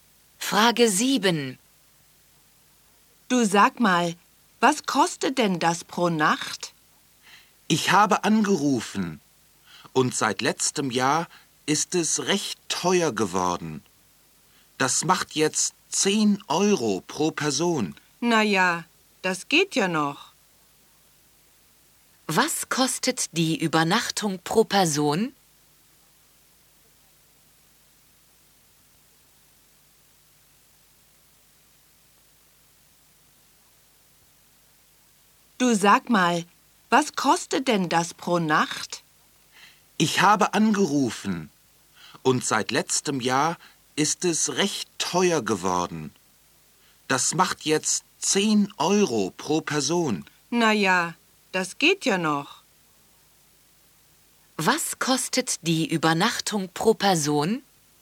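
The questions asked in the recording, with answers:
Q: Was kostet die Übernachtung pro Person?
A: 10 €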